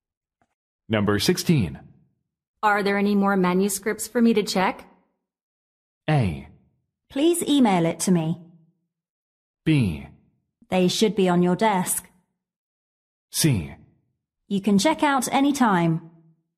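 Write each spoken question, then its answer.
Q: Are there any more manuscripts for me to check?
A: B: They should be on your desk.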